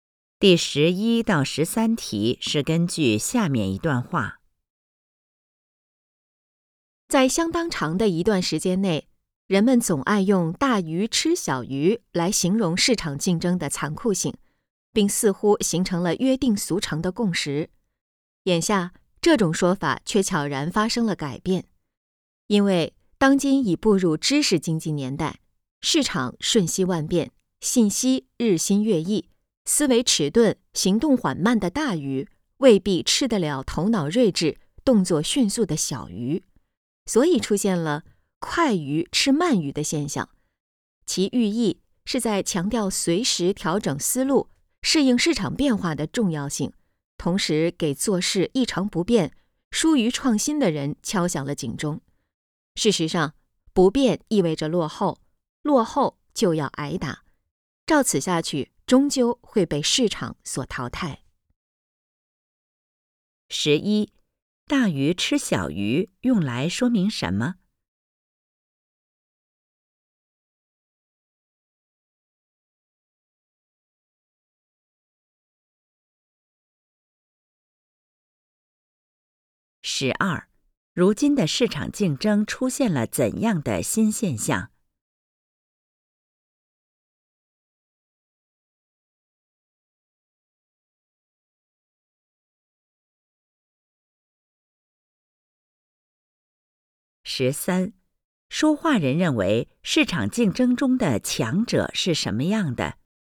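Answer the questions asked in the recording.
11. 市场竞争很残酷
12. 快鱼吃慢鱼
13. 头脑睿智、动作迅速,能随时调整思路适应市场变化的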